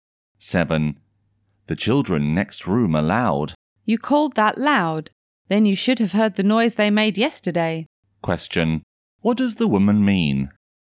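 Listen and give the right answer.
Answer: The children were even louder yesterday; today isn't really loud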